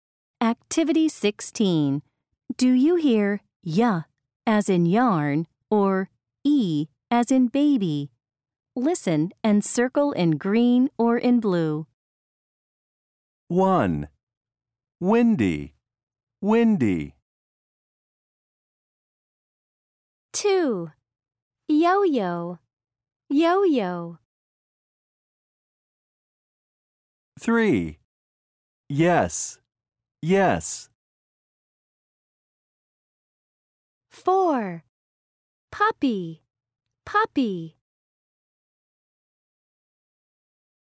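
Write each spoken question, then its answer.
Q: Windy, windy.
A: e as in baby

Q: Yo-yo, yo-yo.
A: y as in yarn

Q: Yes, yes.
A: y as in yarn

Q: Puppy, puppy.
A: e as in baby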